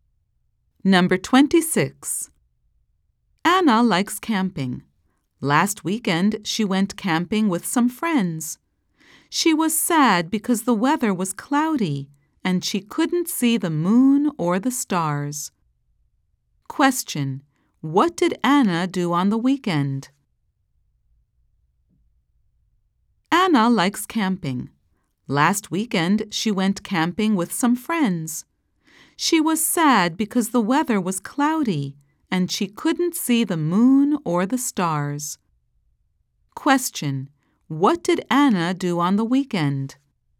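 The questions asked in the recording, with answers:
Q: What did Anna do on the weekend?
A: She went camping with friends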